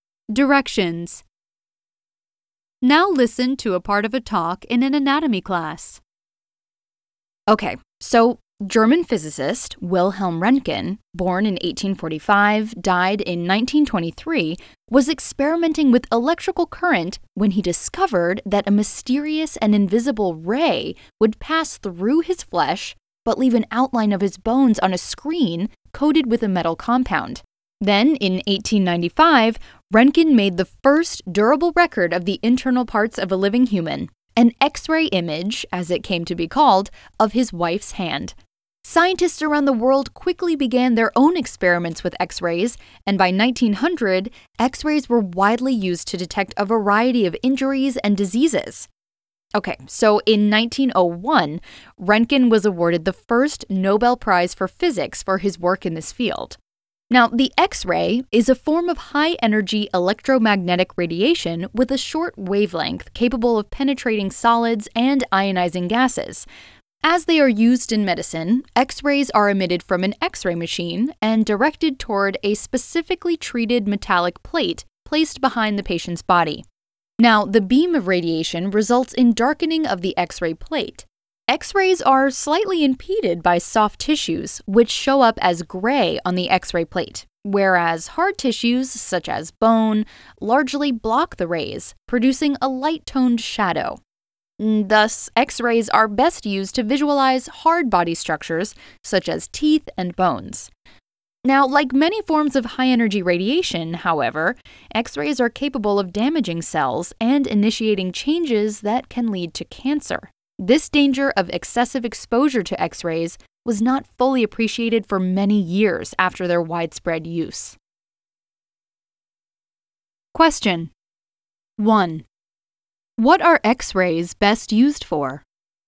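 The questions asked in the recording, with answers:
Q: What are X-rays best used for?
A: To visualize hard body structures, such as teeth and bones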